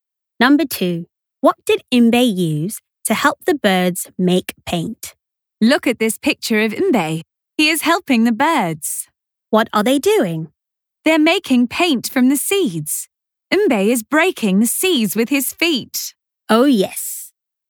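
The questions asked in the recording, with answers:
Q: What did Mbe use to help the birds make paint?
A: his feet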